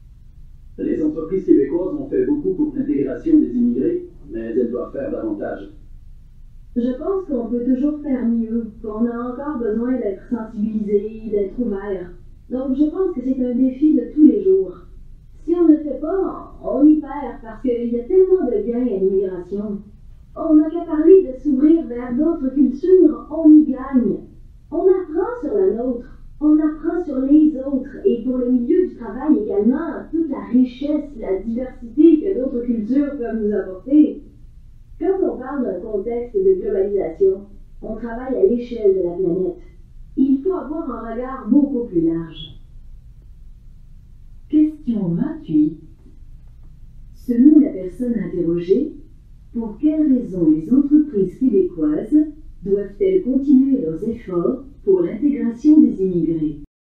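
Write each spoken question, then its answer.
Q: Selon la personne interrogée, pour quelles raisons les entreprises québécoises doivent-elles continuer leurs efforts pour l'intégration des immigrés?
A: Parce que l'immigration apporte beaucoup de gains : l'ouverture aux autres cultures et la richesse de la diversité au travail, dans un contexte de globalisation.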